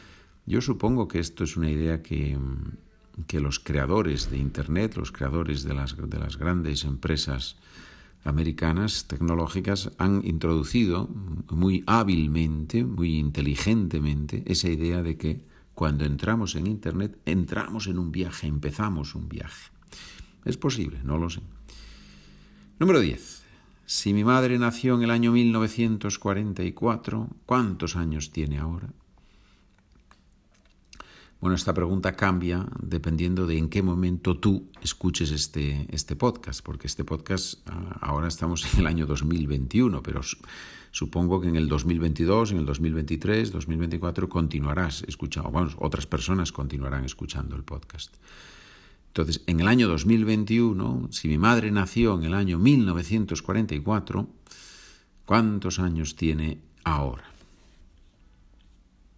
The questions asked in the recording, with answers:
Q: Si mi madre nació en el año 1944, ¿cuántos años tiene ahora?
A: tiene 77 años.